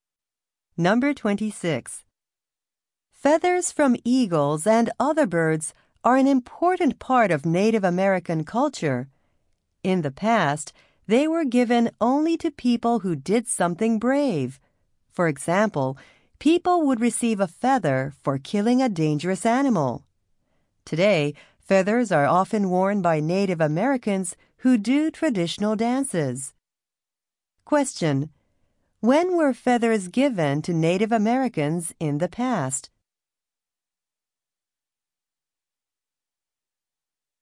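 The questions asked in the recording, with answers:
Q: When were feathers given to Native Americans in the past?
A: When they did something brave.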